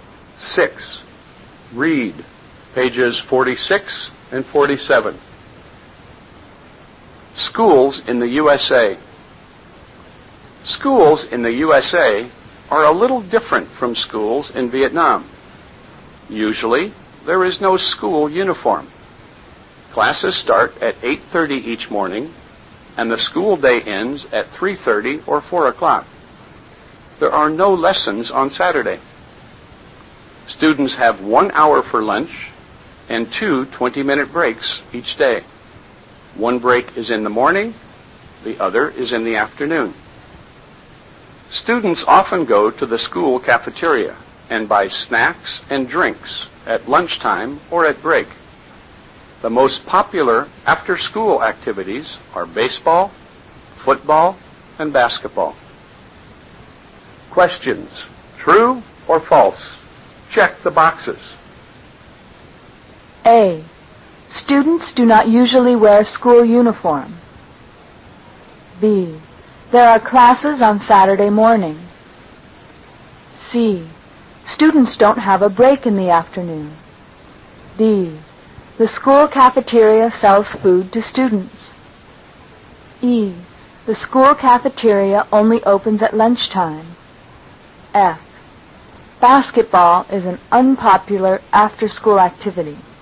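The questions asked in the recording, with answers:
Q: Students do not usually wear school uniform.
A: True

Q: There are classes on Saturday morning.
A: False

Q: Students don't have a break in the afternoon.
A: False

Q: The school cafeteria sells food to students.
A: True

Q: The school cafeteria only opens at lunchtime.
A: False

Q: Basketball is an unpopular after-school activity.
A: False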